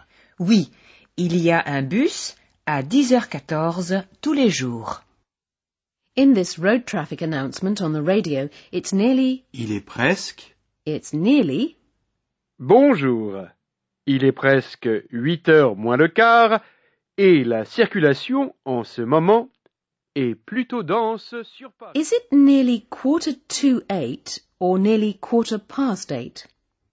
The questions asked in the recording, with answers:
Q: Is it nearly 7:45 or nearly 7:15?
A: It's nearly 7:45.